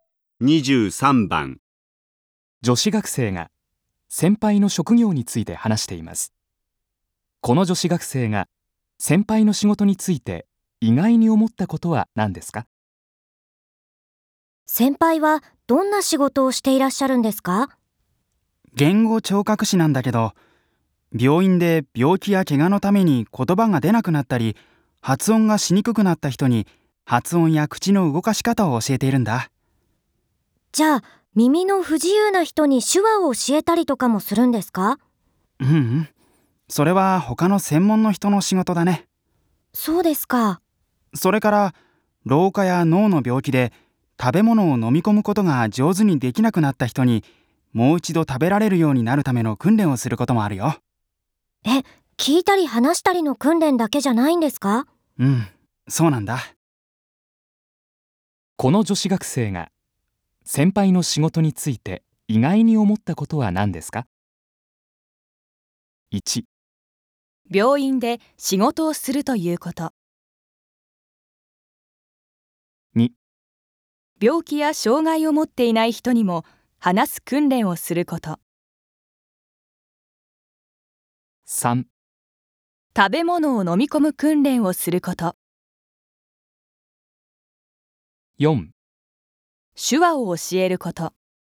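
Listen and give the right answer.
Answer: 3: 食べ物を飲み込む訓練をすること。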